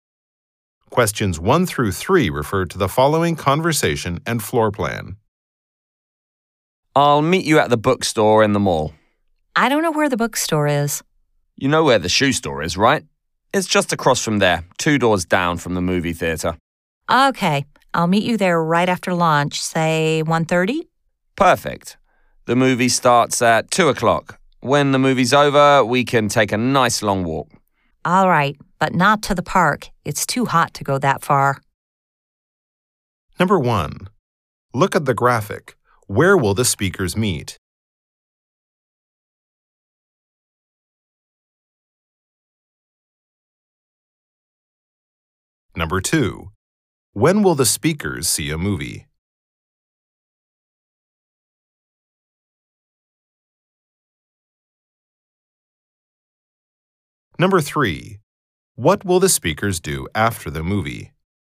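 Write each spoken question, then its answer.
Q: When will the speakers see a movie?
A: At 2 o'clock

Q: What will the speakers do after the movie?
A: Take a long walk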